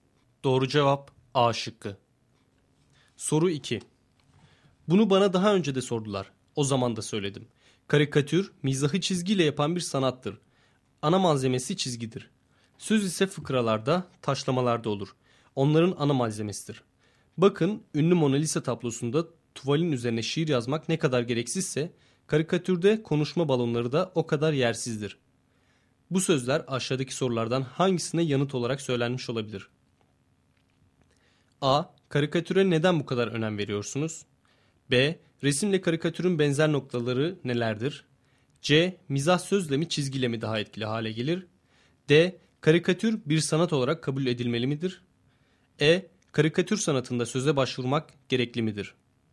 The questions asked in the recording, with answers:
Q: Bu sözler aşağıdaki sorulardan hangisine yanıt olarak söylenmiş olabilir?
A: Doğru cevap E şıkkı.